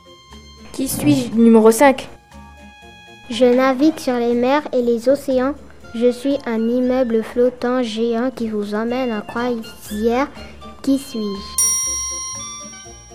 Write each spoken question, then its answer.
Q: Qui suis-je?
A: Ou alors un paquebot?